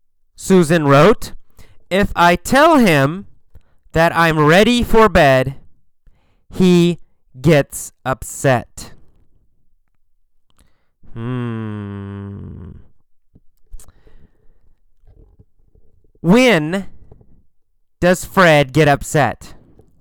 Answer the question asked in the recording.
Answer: Well, he gets upset when Susan is ready for bed.